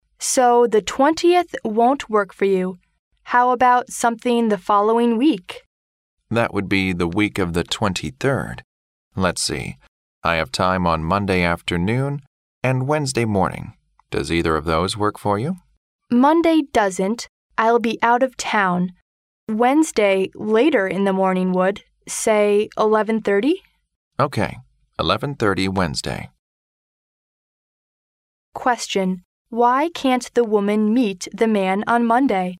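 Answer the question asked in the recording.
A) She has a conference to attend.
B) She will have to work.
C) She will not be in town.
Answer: C) She will not be in town.

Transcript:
W: So, the 20th won't work for you. How about something the following week?
M: That would be the week of the 23rd. Let's see... I have time on Monday afternoon and Wednesday Morning. Does either of those work for you?
W: Monday doesn't; I'll be out of town. Wednesday, later in the morning would. Say, 11:30?
M: OK, 11:30 Wednesday.
Q: Why can't the woman meet the man on Monday?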